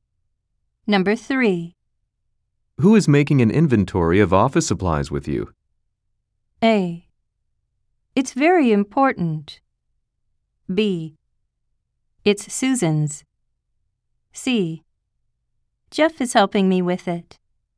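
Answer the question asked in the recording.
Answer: C: Jeff is helping me with it.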